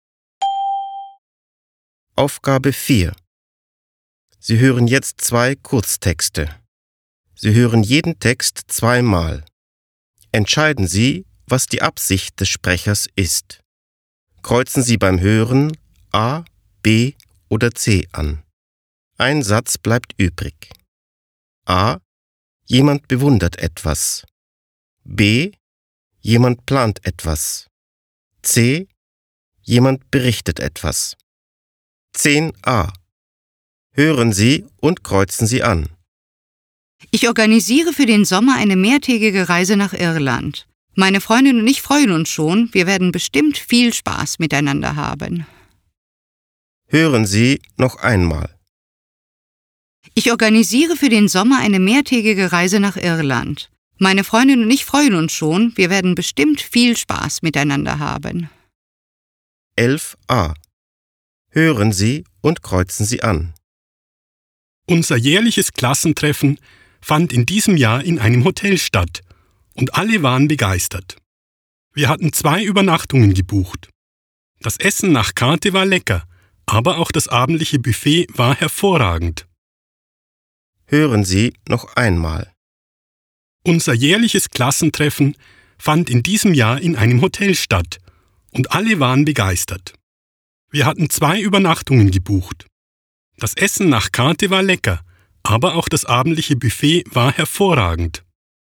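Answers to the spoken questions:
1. B: Jemand plant etwas.
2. C: Jemand berichtet etwas.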